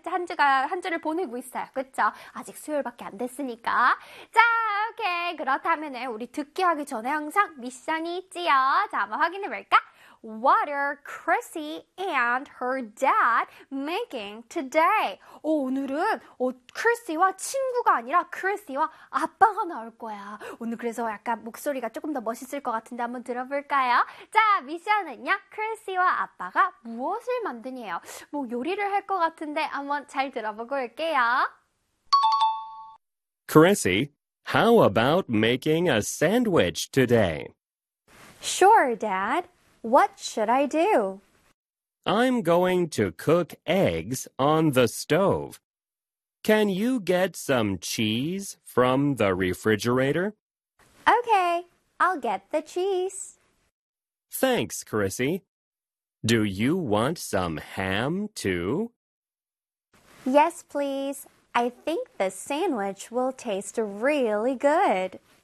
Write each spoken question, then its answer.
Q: What are Chrissy and her dad making today?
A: 오늘 샌드위치를 한번 만들어보는 거 어때? 라고 하시네요.